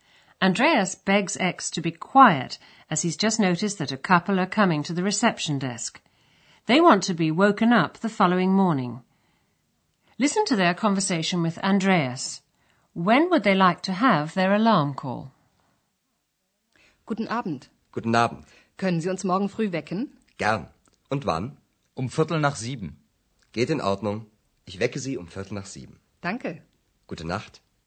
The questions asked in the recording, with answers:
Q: When would they like to have their alarm call?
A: Then they say they'd like to be woken at 7:15.